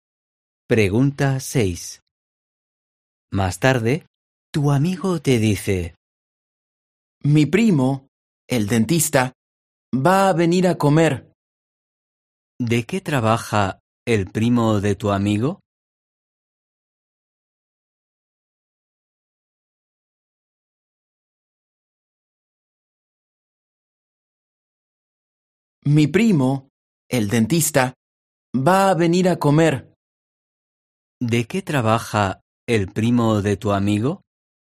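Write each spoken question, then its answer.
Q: ¿De qué trabaja el primo de tu amigo?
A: es dentista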